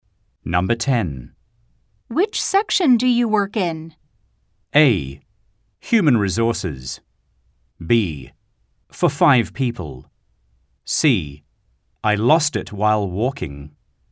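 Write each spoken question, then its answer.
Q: Which section do you work in?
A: A: Human resources.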